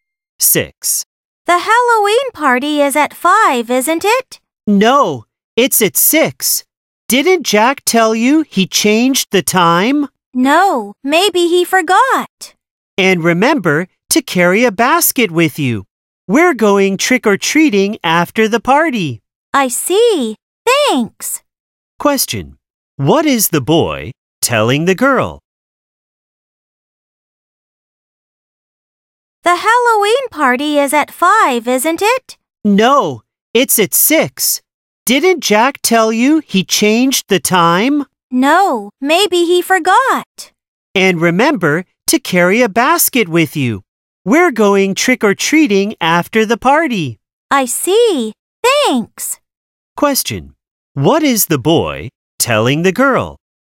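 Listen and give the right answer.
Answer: The party is at 6, and she should bring a basket.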